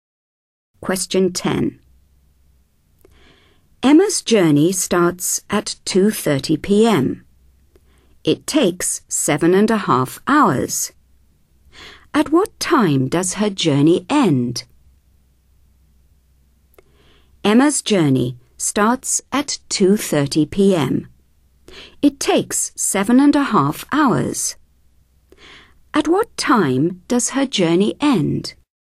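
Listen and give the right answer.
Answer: 10 p.m.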